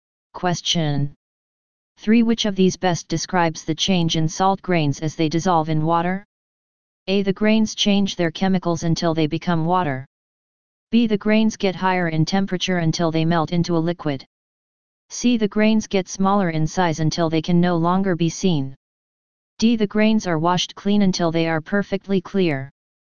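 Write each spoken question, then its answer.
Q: Which of these best describes the change in salt grains as they dissolve in water?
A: C: The grains get smaller in size until they can no longer be seen.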